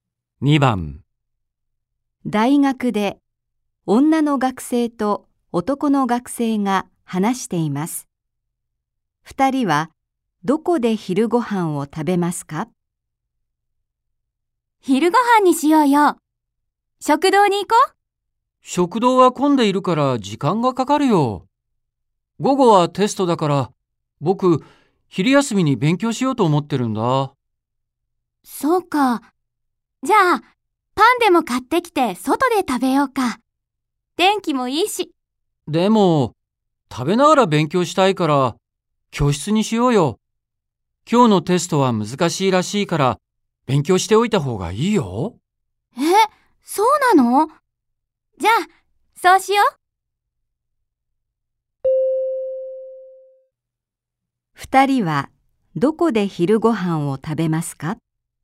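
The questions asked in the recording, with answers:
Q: 二人はどこで昼ご飯を食べますか?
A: 教室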